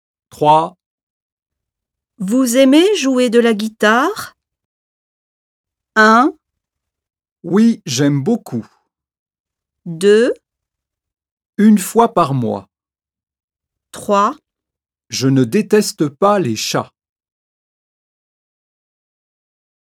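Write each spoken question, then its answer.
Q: Vous aimez jouer de la guitare?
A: 1: Oui, j'aime beaucoup.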